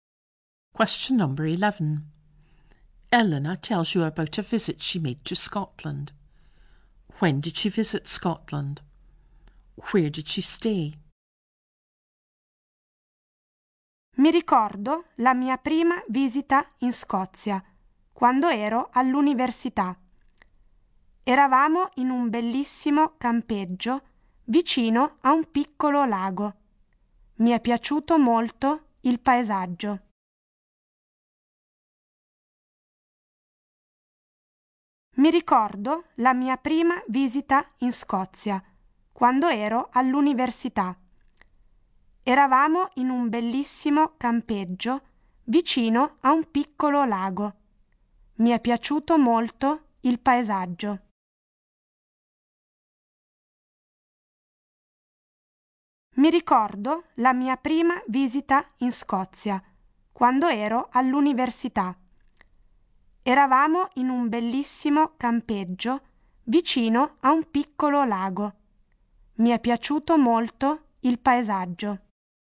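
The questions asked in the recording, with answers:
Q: When did she visit Scotland?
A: When she was at university

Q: Where did she stay?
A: At a campsite near a small lake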